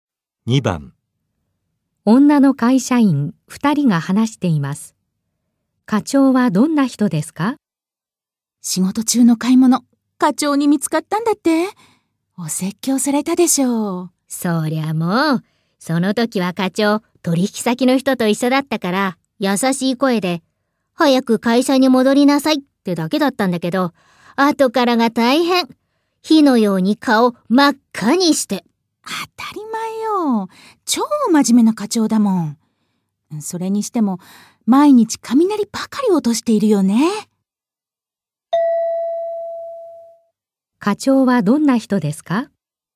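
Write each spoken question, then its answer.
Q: 課長はどんな人ですか?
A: とても真面目で、毎日よく怒る人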